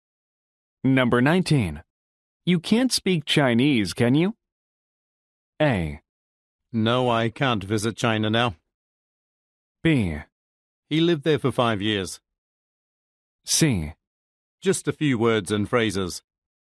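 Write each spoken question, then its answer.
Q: You can't speak Chinese, can you?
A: C: Just a few words and phrases.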